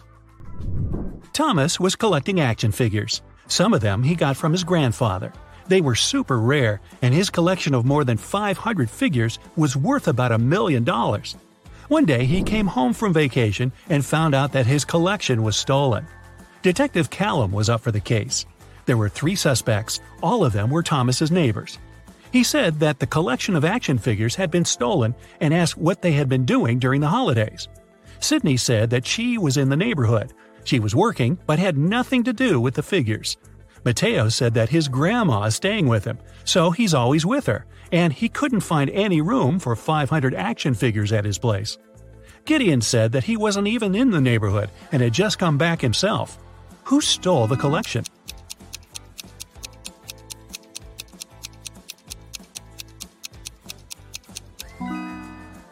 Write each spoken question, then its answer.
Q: Who stole the collection?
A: Mateo. No one mentioned how many figures there were in the collection, but he knew somehow.